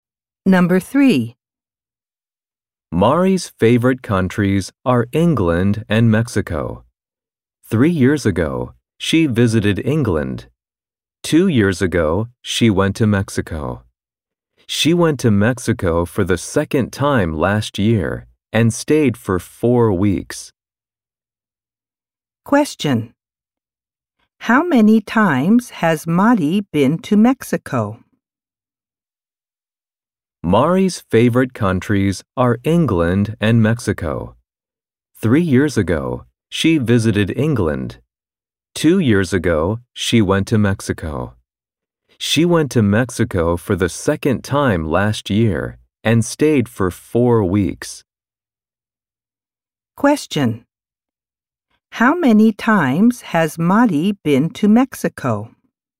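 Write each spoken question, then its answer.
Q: How many times has Mari been to Mexico?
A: Twice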